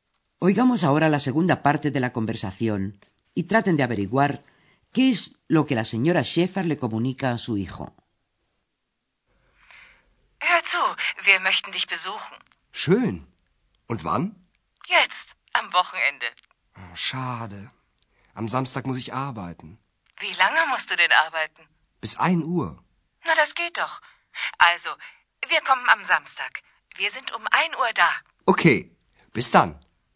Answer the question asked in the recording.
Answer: La madre de Andreas le comunica que ambos, es decir, ella y el padre de Andreas, estarán el sábado a mediodía a la una en el Hotel Europa.